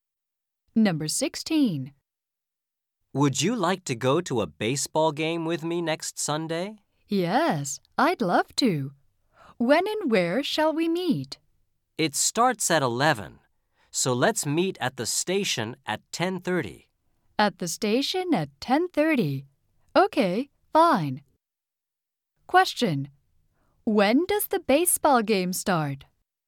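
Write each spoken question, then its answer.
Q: When does the baseball game start?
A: At 11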